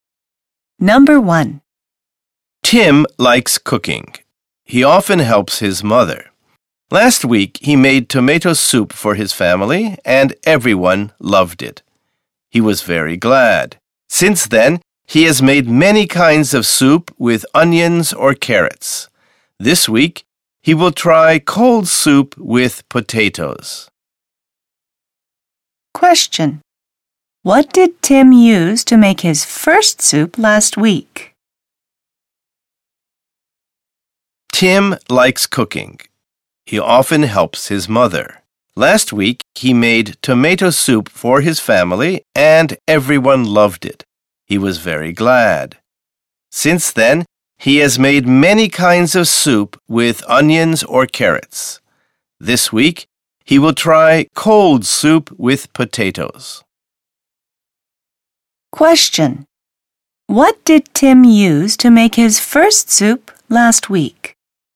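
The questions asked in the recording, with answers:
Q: What did Tim use to make his first soup last week?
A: Tomatoes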